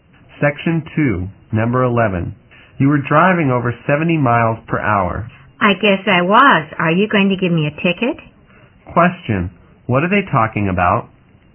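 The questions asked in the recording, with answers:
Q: Question, what are they talking about?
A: The man was speeding (driving over 70 miles per hour) and may get a ticket.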